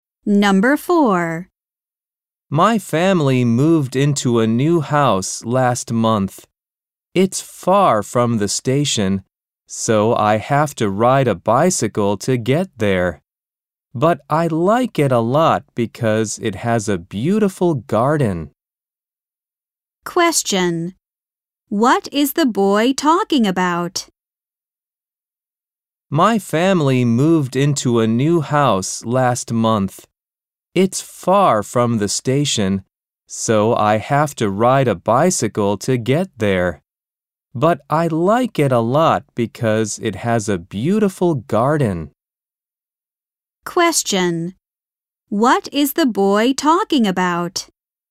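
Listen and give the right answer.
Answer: His family's new house.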